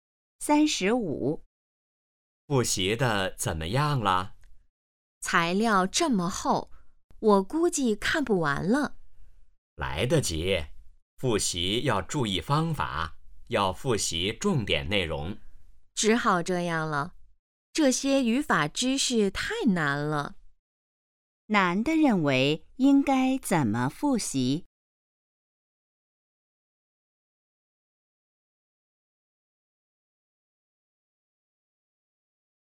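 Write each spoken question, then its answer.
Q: 男的认为应该怎么复习?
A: 复习重点内容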